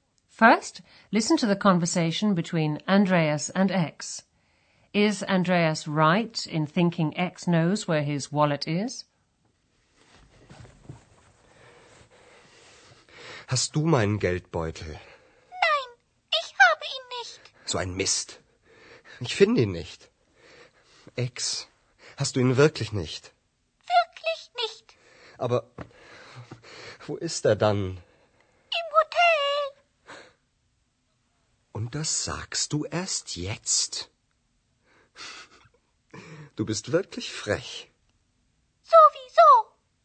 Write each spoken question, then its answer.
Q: Is Andreas right in thinking X knows where his wallet is?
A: X hasn't got Andreas's wallet, but she knows where it is.